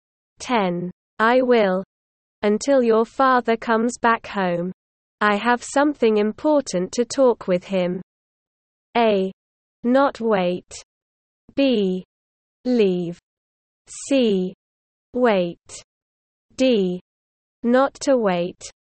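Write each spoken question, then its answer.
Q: I will. Until your father comes back home. I have something important to talk with him.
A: C: Wait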